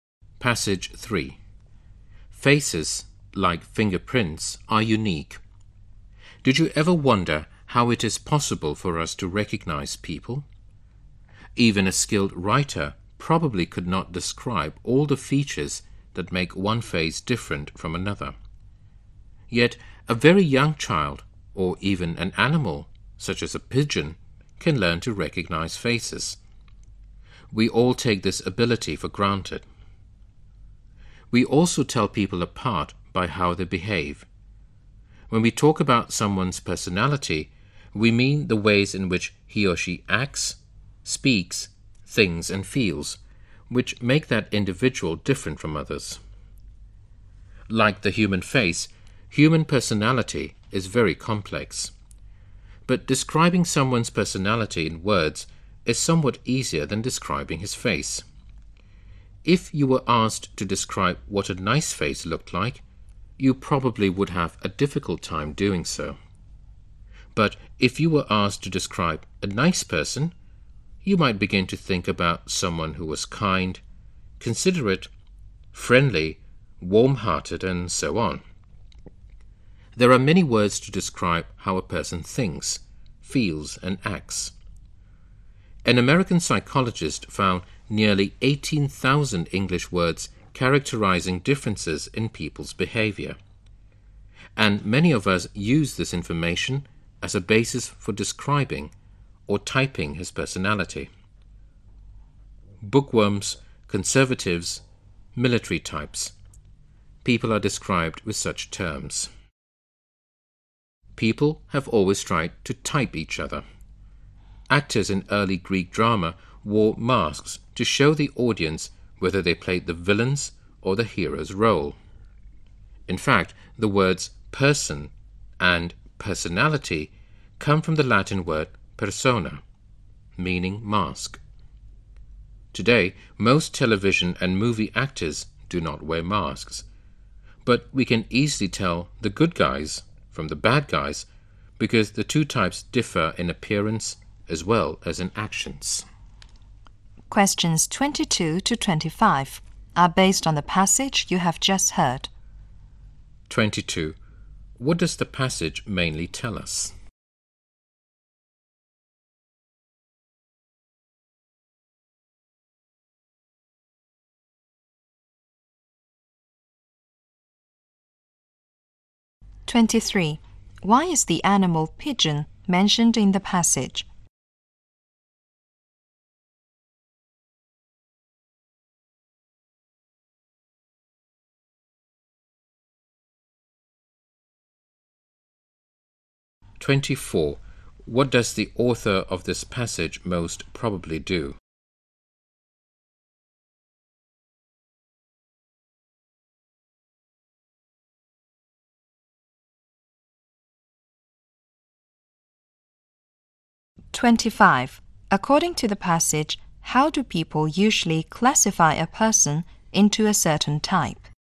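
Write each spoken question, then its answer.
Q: Why is the animal pigeon mentioned in the passage?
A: To show that even animals can learn to recognize faces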